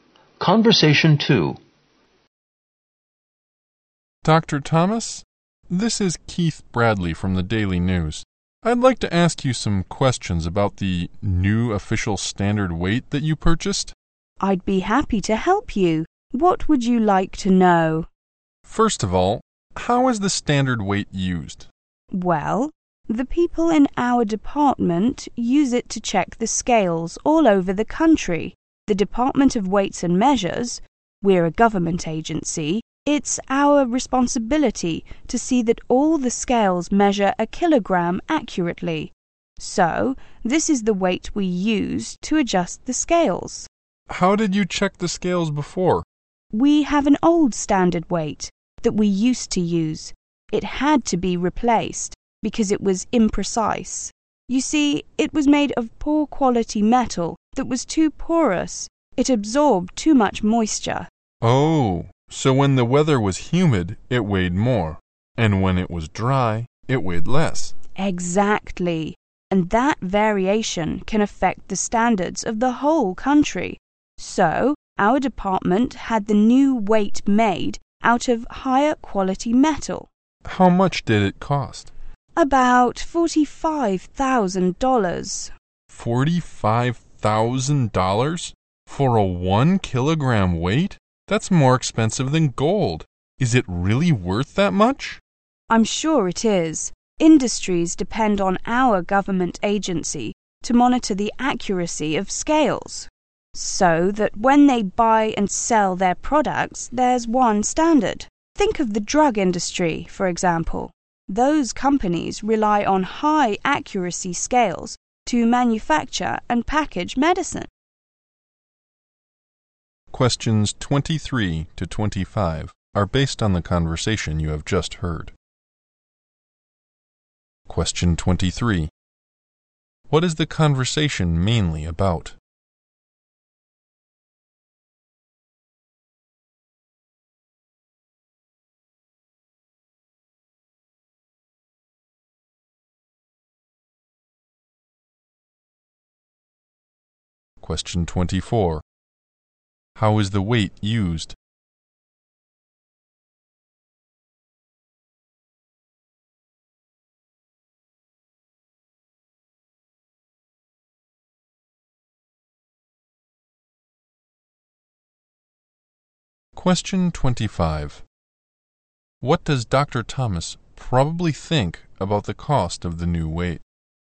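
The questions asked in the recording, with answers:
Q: What is the conversation mainly about?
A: The new official standard weight

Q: How is the weight used?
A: To check and adjust scales all over the country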